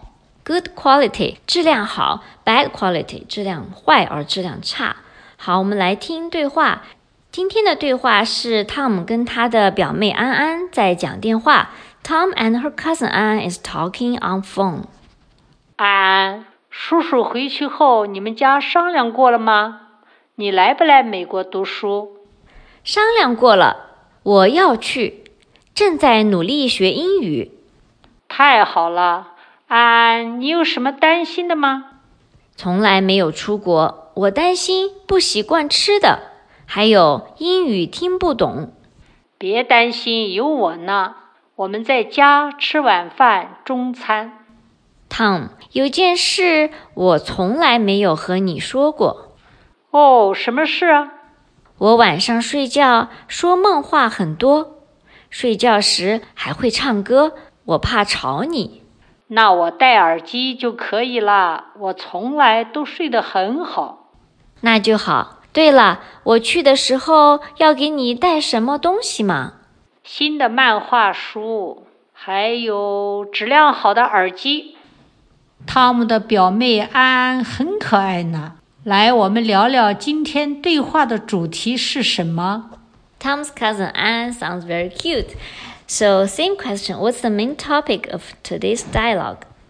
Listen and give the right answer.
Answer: Tom 的表妹安安告诉 Tom 要来美国读书了,还说了安安担心的事。